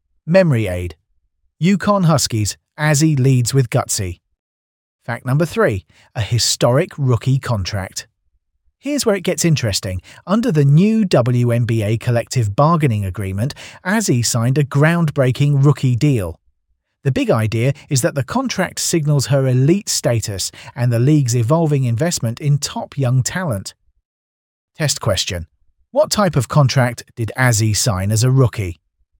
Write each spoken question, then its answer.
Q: What type of contract did Azzy sign as a rookie?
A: Correct answer. Historic rookie contract.